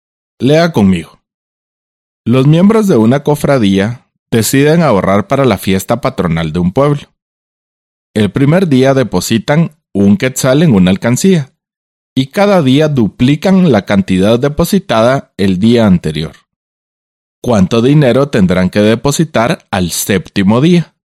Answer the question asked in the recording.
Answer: Así que el séptimo día tendrán que depositar 64 quetzales.